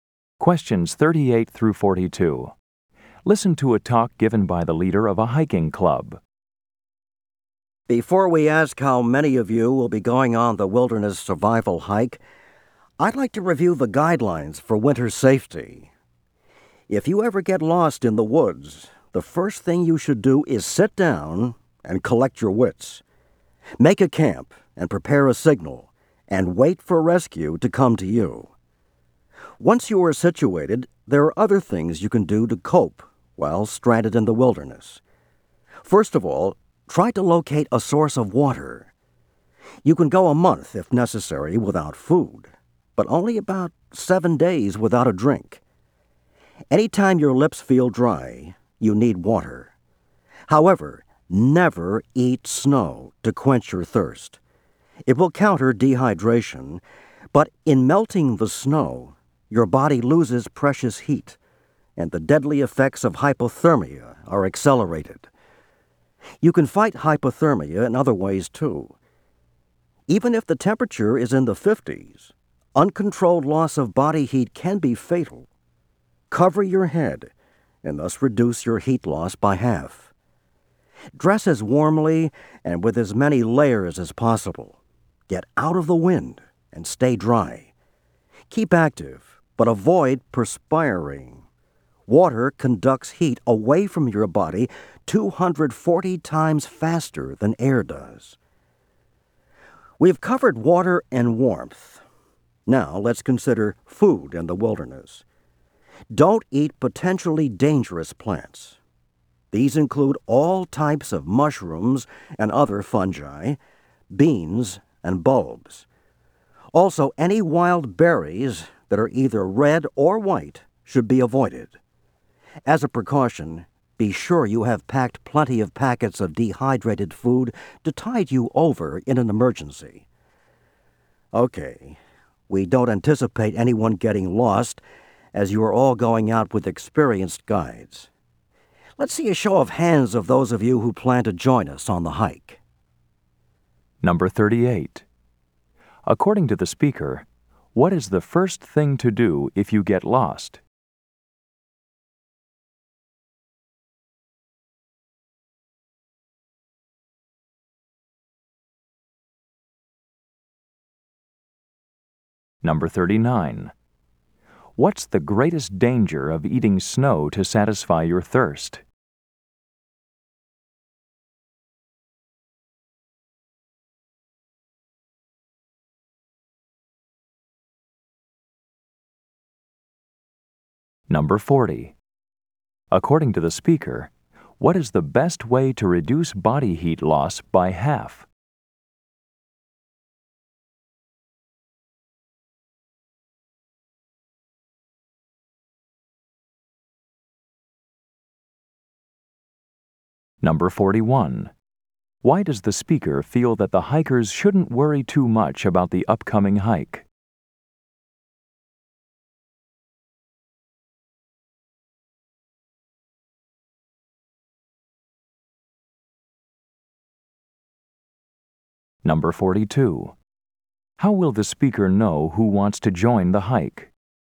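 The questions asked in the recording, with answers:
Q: According to the speaker, what is the first thing to do if you get lost?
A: Sit down and collect your wits

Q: What's the greatest danger of eating snow to satisfy your thirst?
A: It speeds up hypothermia because the body loses heat melting it

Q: According to the speaker, what is the best way to reduce body heat loss by half?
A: Cover your head

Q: Why does the speaker feel that the hikers shouldn't worry too much about the upcoming hike?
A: They are all going out with experienced guides

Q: How will the speaker know who wants to join the hike?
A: By a show of hands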